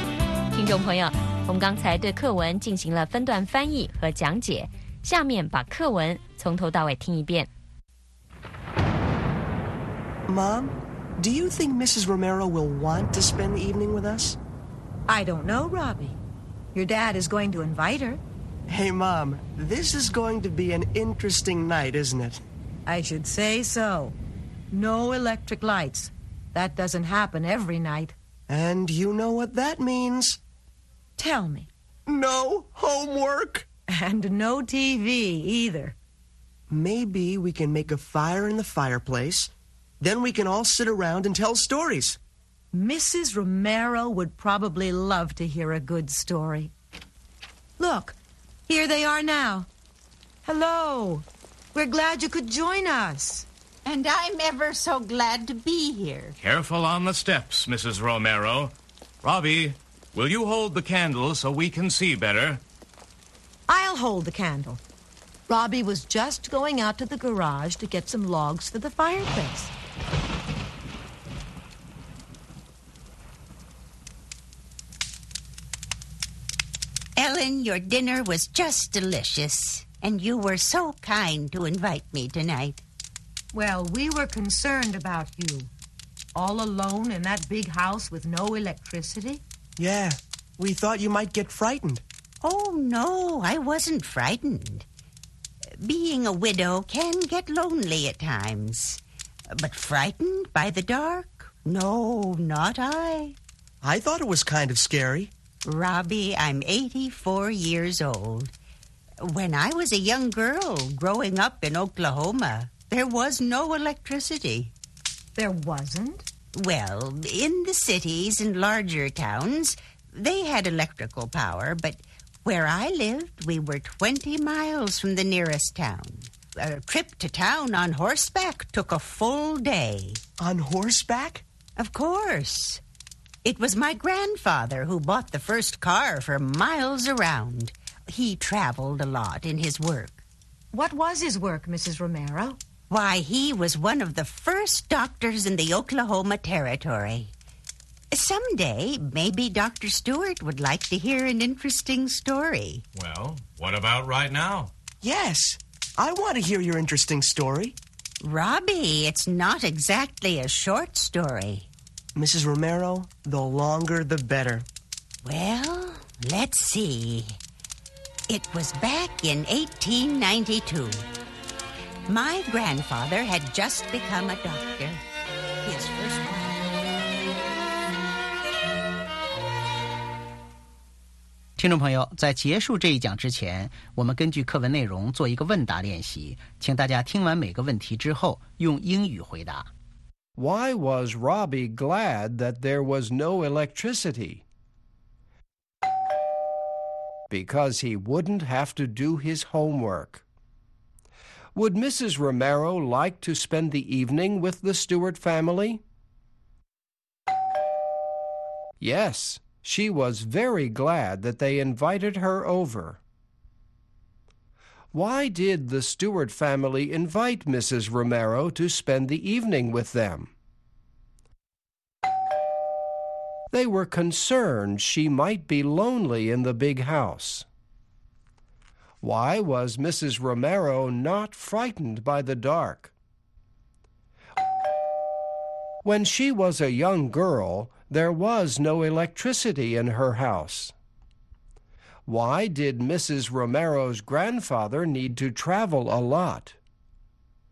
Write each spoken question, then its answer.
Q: Why was Robbie glad that there was no electricity?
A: Because he wouldn't have to do his homework.

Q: Would Mrs. Romero like to spend the evening with the Stewart family?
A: Yes, she was very glad that they invited her over.

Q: Why did the Stewart family invite Mrs. Romero to spend the evening with them?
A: They were concerned she might be lonely in the big house.

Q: Why did Mrs. Romero's grandfather need to travel a lot?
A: Because he was a doctor in the Oklahoma Territory.